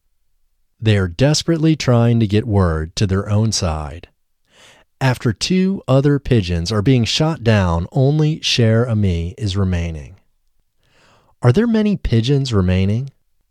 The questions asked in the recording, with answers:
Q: Are there many pigeons remaining?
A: No, there aren't many pigeons remaining.